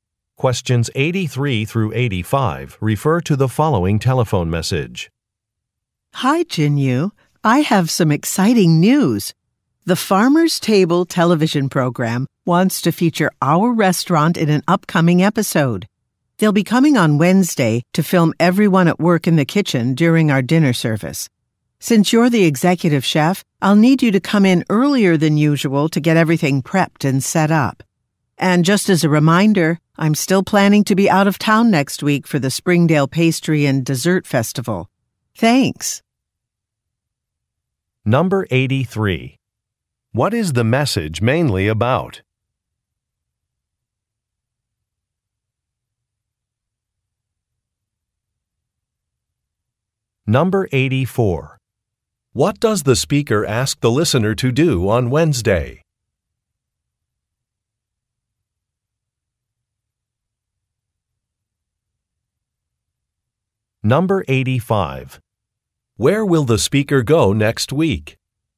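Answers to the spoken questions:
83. A TV program featuring the restaurant
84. Come in earlier than usual
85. To a pastry and dessert festival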